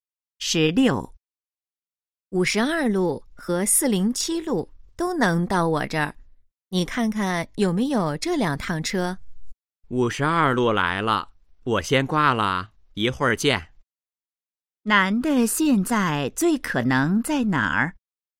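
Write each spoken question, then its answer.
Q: 男的现在最可能在哪儿?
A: 公共汽车站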